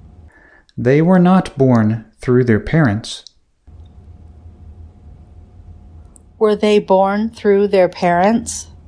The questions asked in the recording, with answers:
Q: Were they born through their parents?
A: No, they weren't.